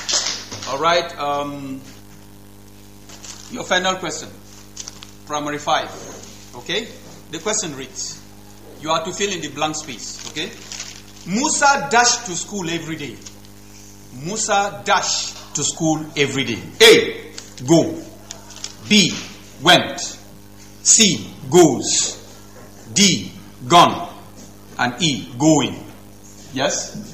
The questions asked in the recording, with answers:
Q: Musa dashed to school every day.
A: The answer is C, which is goes.